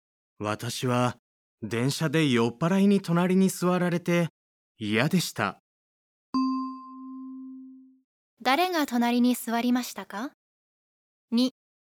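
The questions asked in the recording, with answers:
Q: 誰が隣に座りましたか?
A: 酔っ払い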